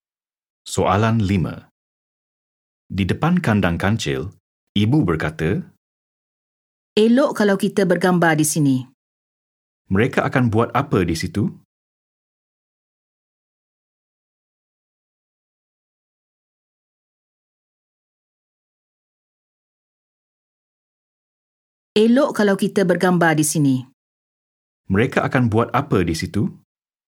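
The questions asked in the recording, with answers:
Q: Mereka akan buat apa di situ?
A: Bergambar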